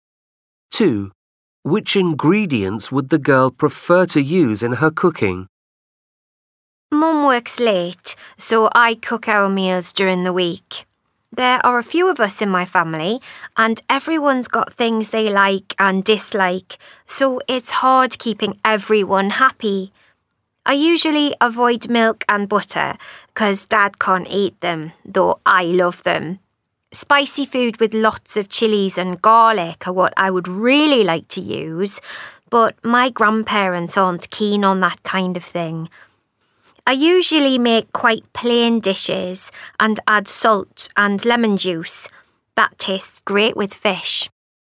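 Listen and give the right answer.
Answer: chilies and garlic (spicy food)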